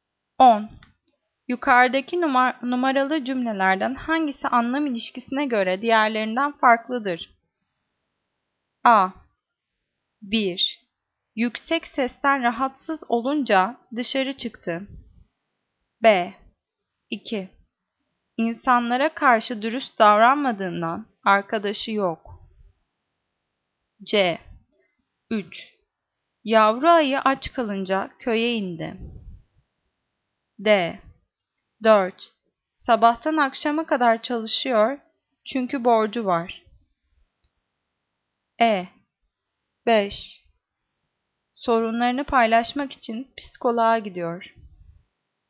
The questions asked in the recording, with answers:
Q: Yukarıdaki numaralı cümlelerden hangisi anlam ilişkisine göre diğerlerinden farklıdır?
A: Cevap E. 5. Sorunlarını paylaşmak için psikoloğa gidiyor.